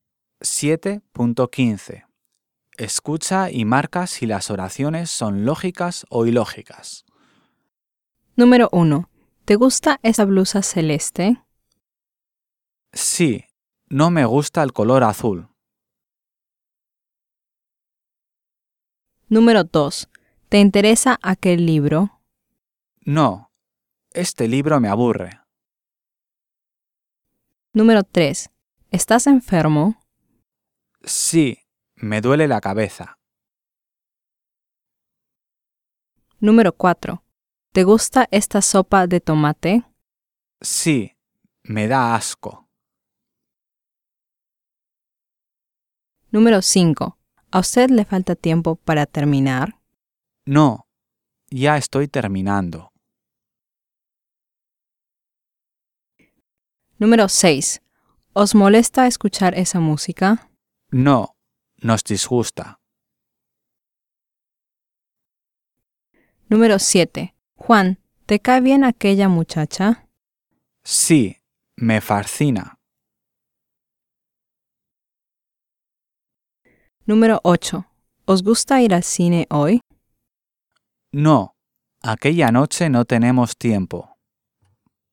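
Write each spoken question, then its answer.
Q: ¿Te gusta esa blusa celeste?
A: ilógica

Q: ¿Estás enfermo?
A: lógica

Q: ¿Te gusta esta sopa de tomate?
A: ilógica

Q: ¿A usted le falta tiempo para terminar?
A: lógica

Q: ¿Os molesta escuchar esa música?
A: ilógica

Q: Juan, ¿te cae bien aquella muchacha?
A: lógica

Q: ¿Os gusta ir al cine hoy?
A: ilógica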